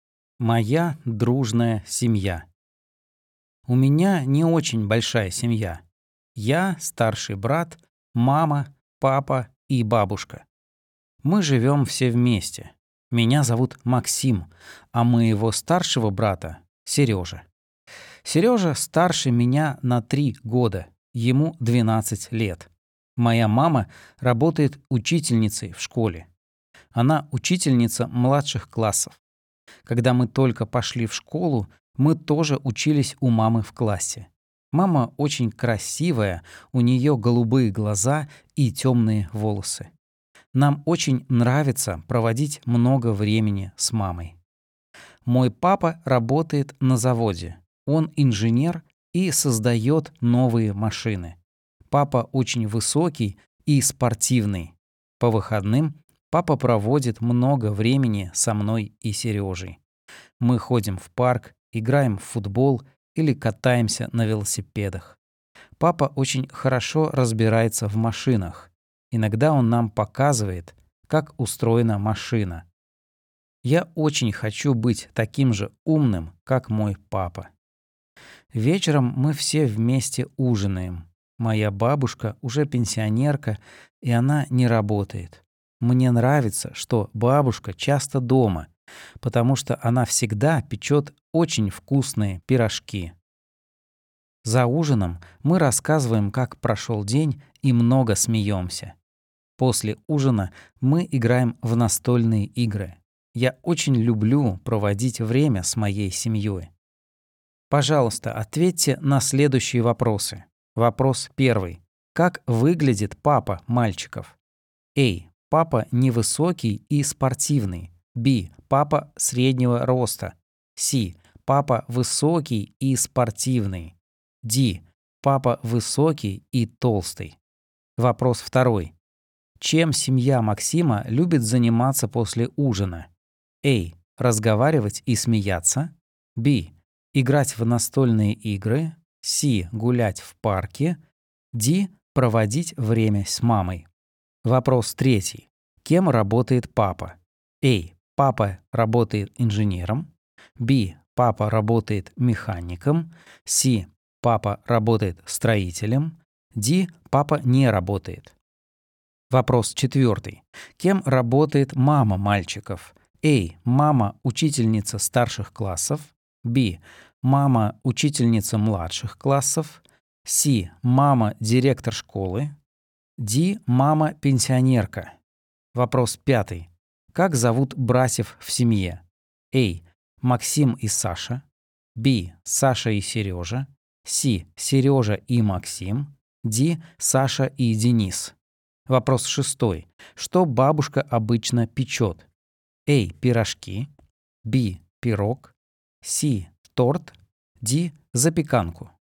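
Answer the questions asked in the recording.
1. C: Папа высокий и спортивный.
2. B: Играть в настольные игры.
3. A: Папа работает инженером.
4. B: Мама — учительница младших классов.
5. C: Сережа и Максим.
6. A: Пирожки.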